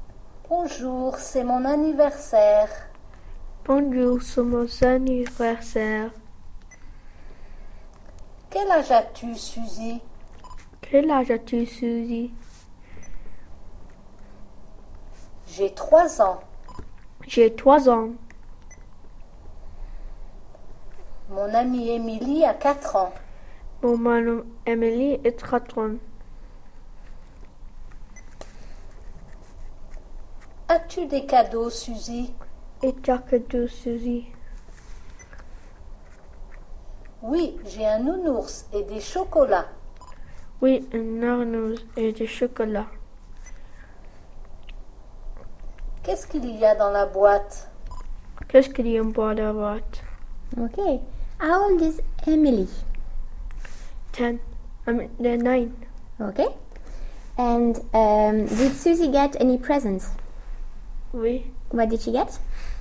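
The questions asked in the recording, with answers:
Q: And did Susie get any presents?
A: Oui.

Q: What did she get?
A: A teddy bear and chocolates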